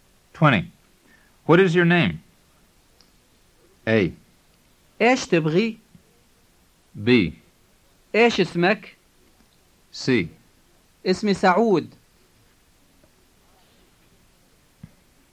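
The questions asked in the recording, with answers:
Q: What is your name?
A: B: إيش اسمك؟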